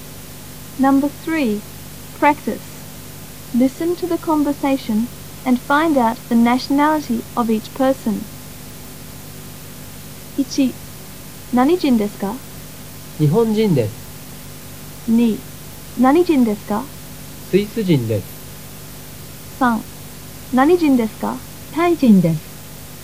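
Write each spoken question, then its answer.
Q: 何人ですか?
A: 日本人

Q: 何人ですか?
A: スイス人

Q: 何人ですか?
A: タイ人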